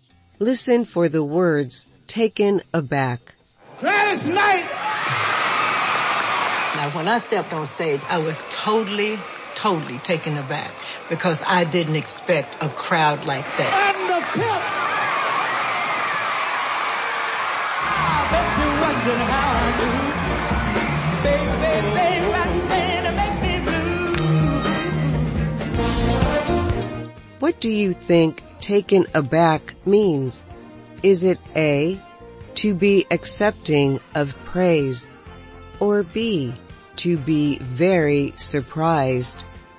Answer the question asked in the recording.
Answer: The answer is B, to be very surprised.